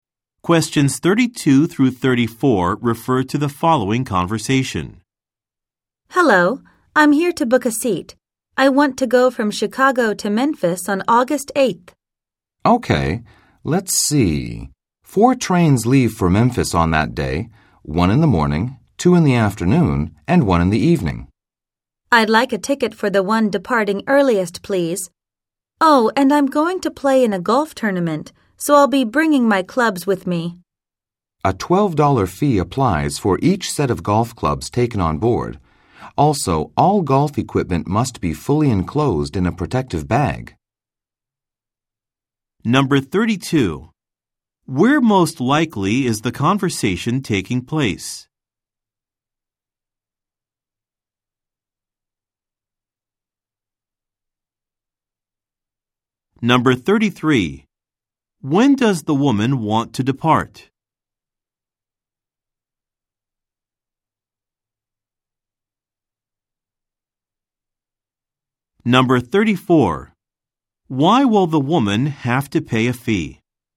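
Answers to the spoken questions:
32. At a train station ticket counter
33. On the morning of August 8th, on the earliest train
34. She is bringing golf clubs on board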